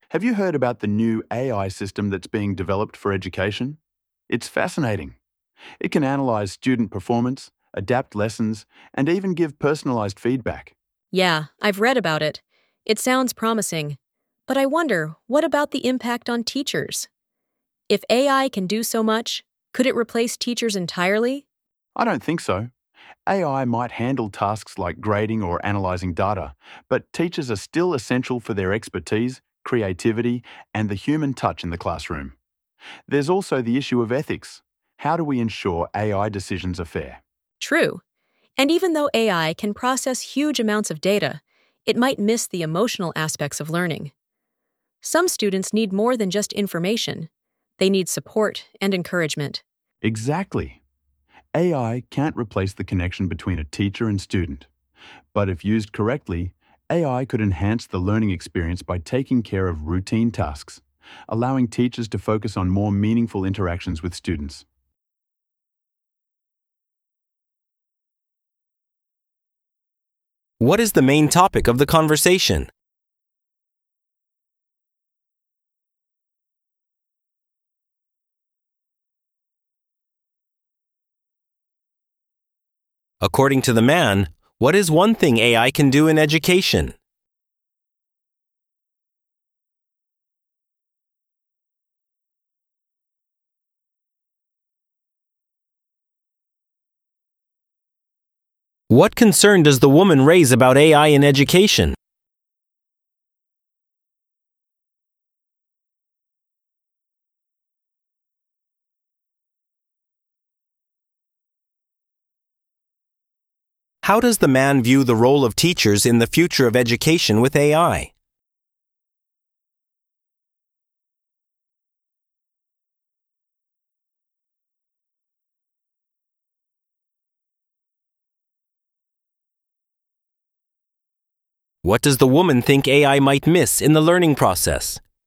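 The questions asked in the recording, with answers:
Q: What is the main topic of the conversation?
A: The impact of AI on education and teachers

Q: How does the man view the role of teachers in the future of education with AI?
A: Teachers remain essential; AI can't replace them

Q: What does the woman think AI might miss in the learning process?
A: The emotional aspects of learning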